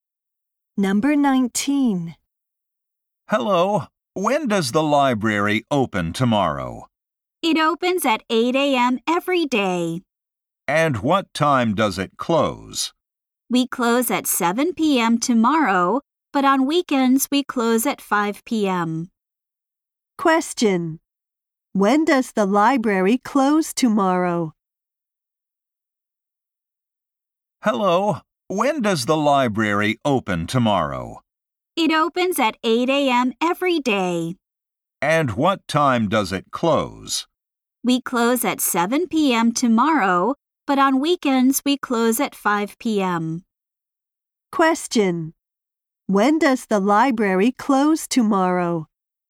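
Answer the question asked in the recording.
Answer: At 7 p.m.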